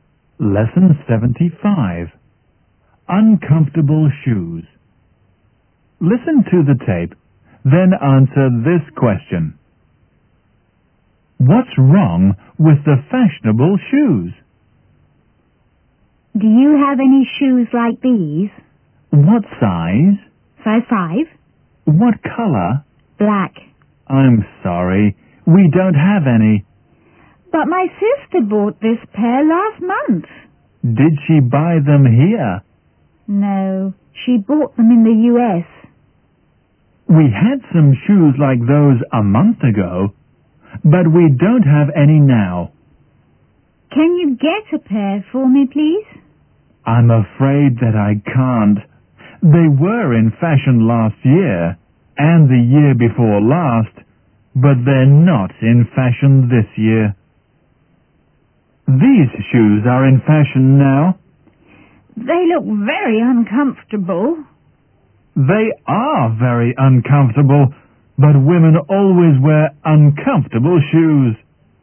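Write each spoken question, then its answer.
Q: What's wrong with the fashionable shoes?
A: They are very uncomfortable.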